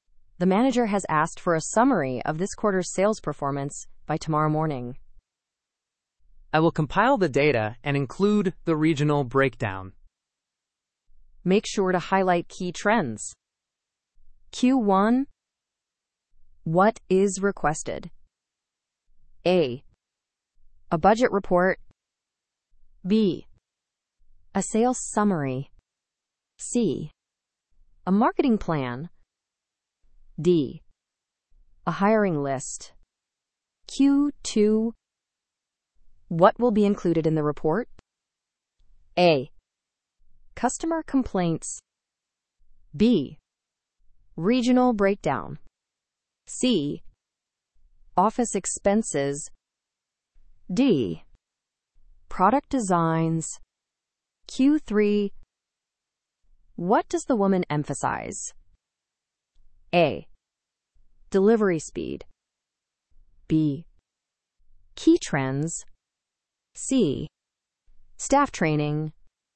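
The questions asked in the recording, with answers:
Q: What is requested?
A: B: A sales summary.

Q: What will be included in the report?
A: B: Regional breakdown.

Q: What does the woman emphasize?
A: B: Key trends.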